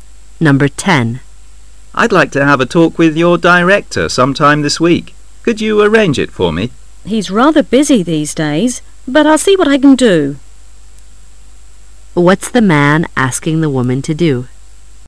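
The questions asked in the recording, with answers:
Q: What's the man asking the woman to do?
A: Arrange a meeting with her director

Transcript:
[解析] M;I'd like to have a talk with your director sometime this week.Could you arrange it for me? W:He's rather busy these days,but I'll see what l can do. Q:What's the man asking the woman to do?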